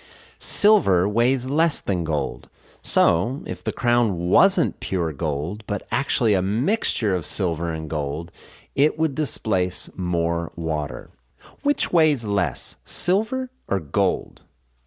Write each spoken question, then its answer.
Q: Which weighs less, silver or gold?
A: Silver weighs less than gold.